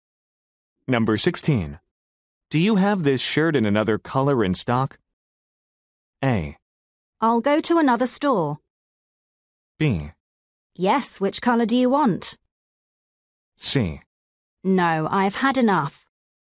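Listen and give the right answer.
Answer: B: Yes, which color do you want?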